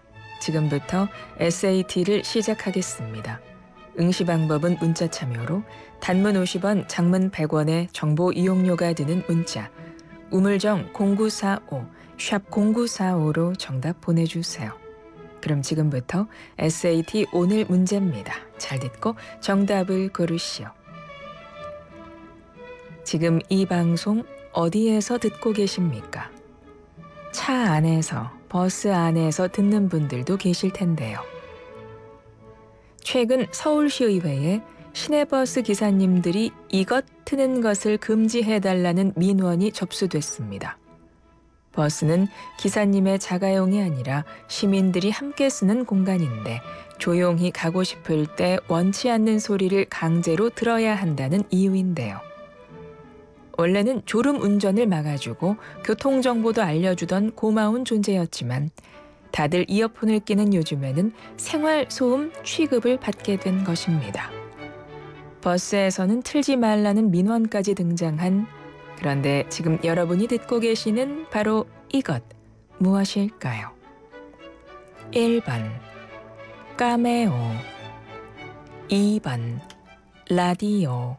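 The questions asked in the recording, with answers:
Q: 버스에서는 틀지 말라는 민원까지 등장한 그런데 지금 여러분이 듣고 계시는 바로 이것 무엇일까요?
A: 2: 라디오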